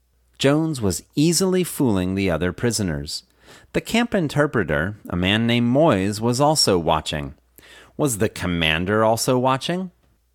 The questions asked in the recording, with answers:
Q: Was the commander also watching?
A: No, the commander wasn't also watching.